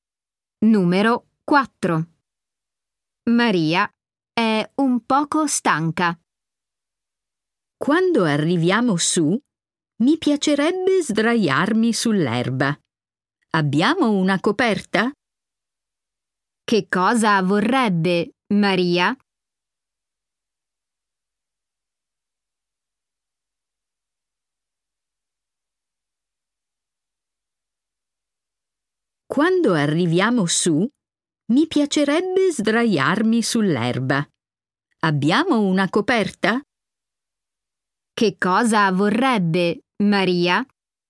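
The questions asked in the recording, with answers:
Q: Che cosa vorrebbe Maria?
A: Sdraiarsi sull'erba (su una coperta)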